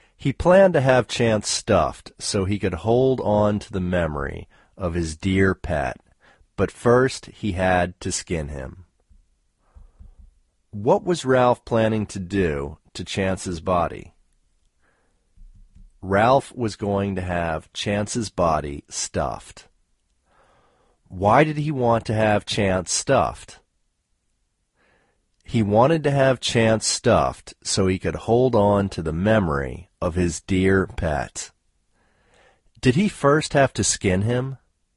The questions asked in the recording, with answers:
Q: What was Ralph planning to do to Chance's body?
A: Ralph was going to have Chance's body stuffed.

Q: Did he first have to skin him?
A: Yes, he first had to skin him.